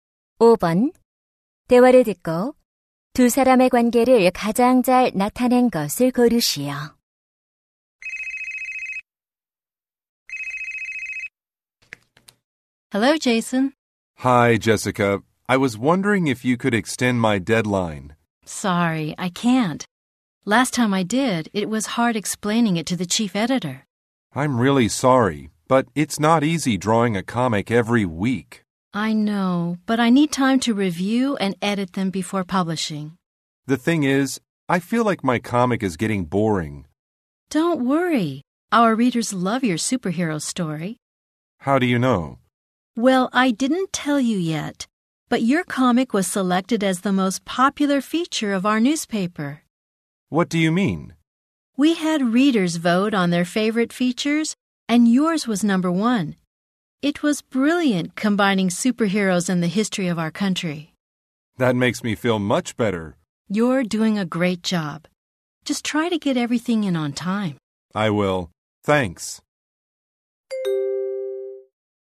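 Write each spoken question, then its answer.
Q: 대화를 듣고 두 사람의 관계를 가장 잘 나타낸 것을 고르시오.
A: 만화가 - 신문 편집자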